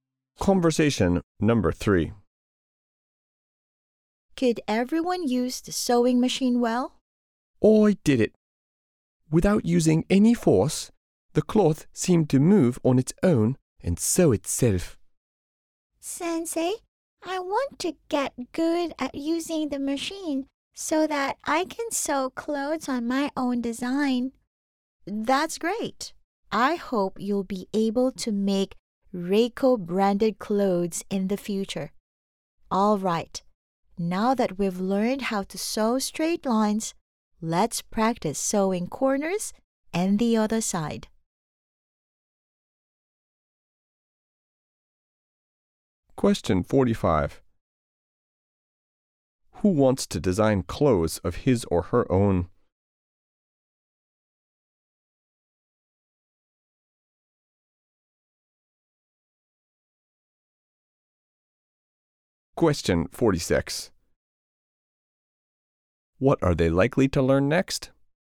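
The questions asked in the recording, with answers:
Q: Who wants to design clothes of his or her own?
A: Reiko, the student

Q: What are they likely to learn next?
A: How to sew corners and the other side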